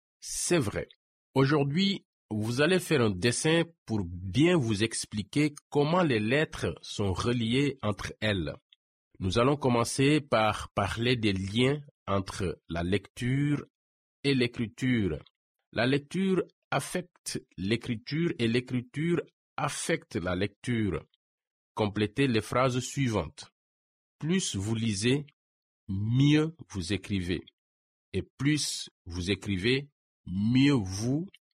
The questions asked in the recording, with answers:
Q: Et plus vous écrivez, mieux vous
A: lisez.